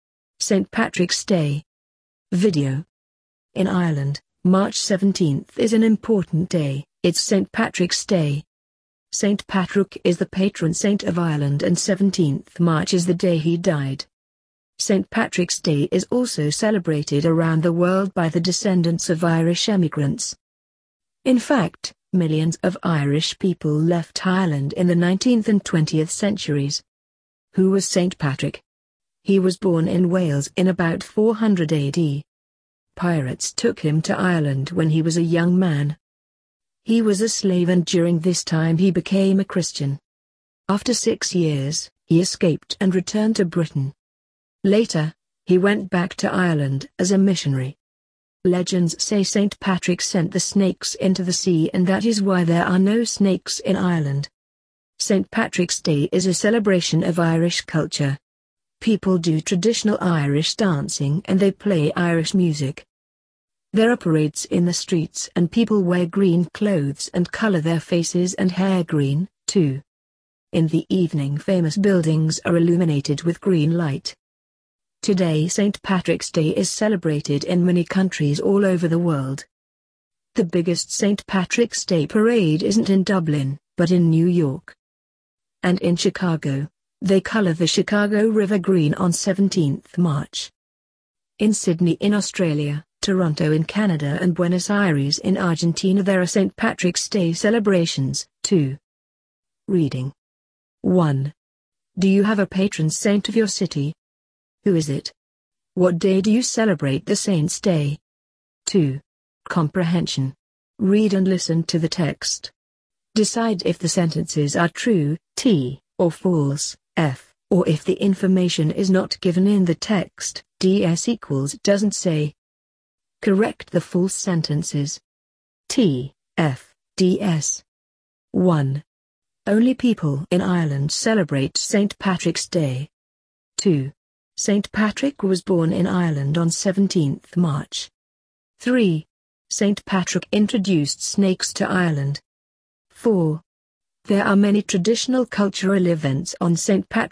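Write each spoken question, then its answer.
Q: Only people in Ireland celebrate St. Patrick's Day.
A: F: it is celebrated around the world

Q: St. Patrick was born in Ireland on 17th March.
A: F: he was born in Wales; 17th March is the day he died

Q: St. Patrick introduced snakes to Ireland.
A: F: he sent the snakes into the sea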